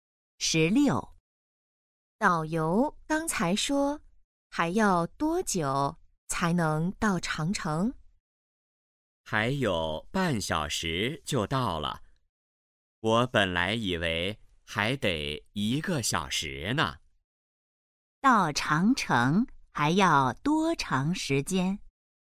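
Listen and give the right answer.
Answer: 半小时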